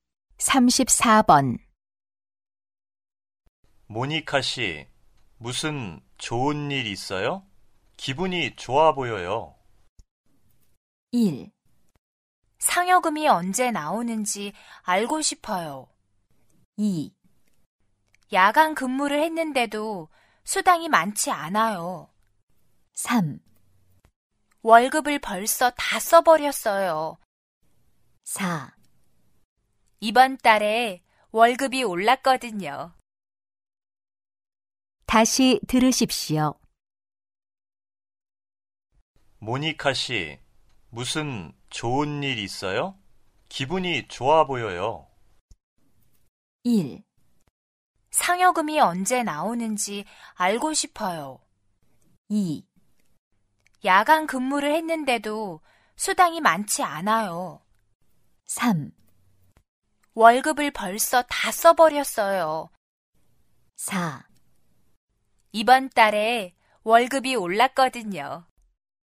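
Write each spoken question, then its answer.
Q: 모니카 씨, 무슨 좋은 일 있어요? 기분이 좋아 보여요.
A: 4: 이번 달에 월급이 올랐거든요.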